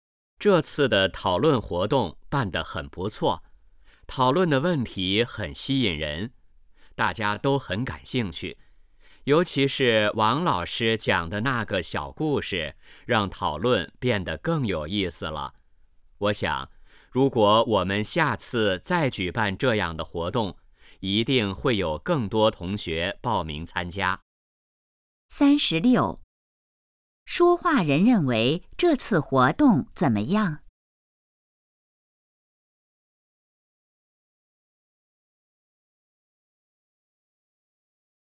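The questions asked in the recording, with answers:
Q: 说话人认为这次活动怎么样?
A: 很不错

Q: 王老师在活动中做了什么?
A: 讲了一个小故事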